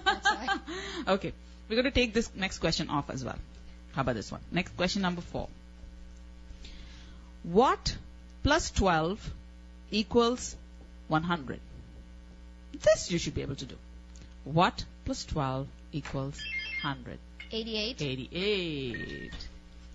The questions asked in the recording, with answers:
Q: What plus 12 equals 100?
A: 88.